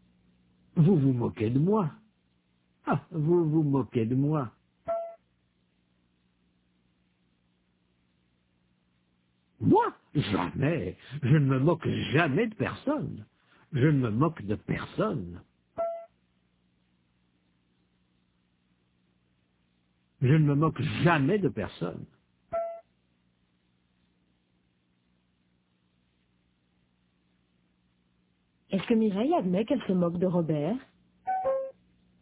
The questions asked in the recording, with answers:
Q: Est-ce que Mireille admet qu'elle se moque de Robert?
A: Non. Elle ne se moque jamais de personne.